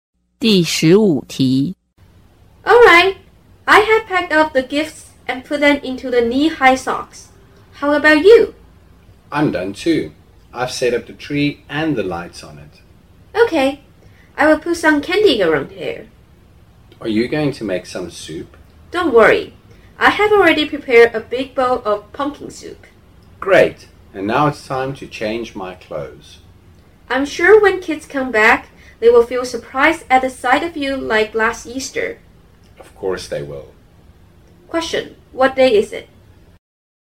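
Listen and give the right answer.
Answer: Christmas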